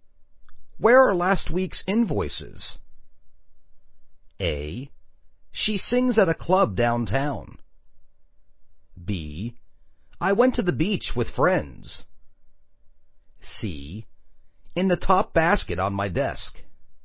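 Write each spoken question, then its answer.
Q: Where are last week's invoices?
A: C: In the top basket on my desk.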